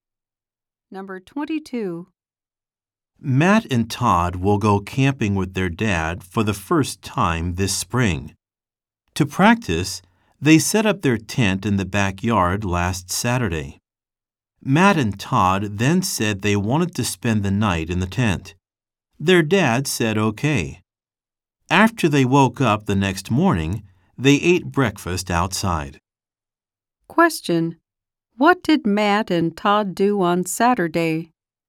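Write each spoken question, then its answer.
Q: What did Matt and Todd do on Saturday?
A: They set up their tent in the backyard and slept in it.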